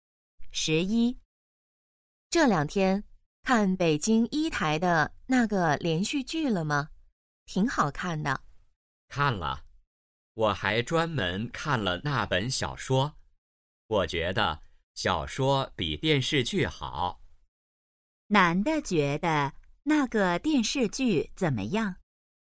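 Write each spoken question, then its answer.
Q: 男的觉得那个电视剧怎么样?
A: 不如小说好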